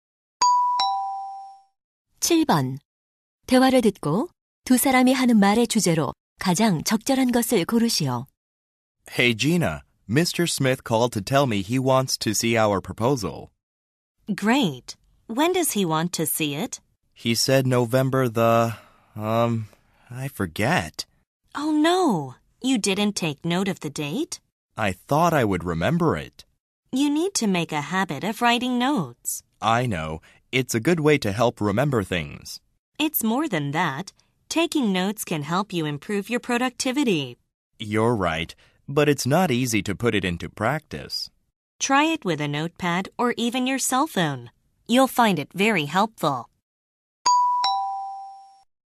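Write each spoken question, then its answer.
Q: 대화를 듣고 두 사람이 하는 말의 주제로 가장 적절한 것을 고르시오.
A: 메모하는 습관의 중요성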